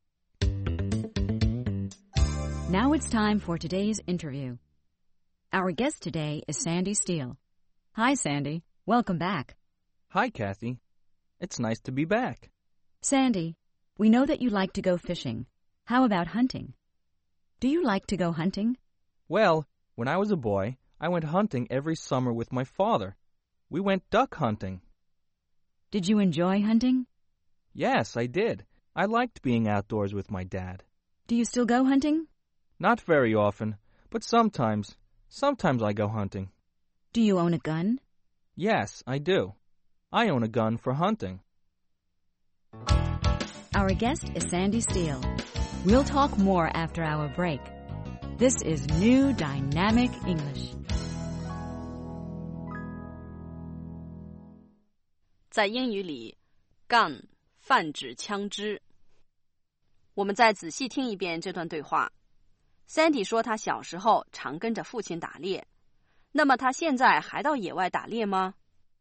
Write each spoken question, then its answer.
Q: Sandy 说他小时候常跟着父亲打猎,那么他现在还到野外打猎吗?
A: Not very often, but sometimes.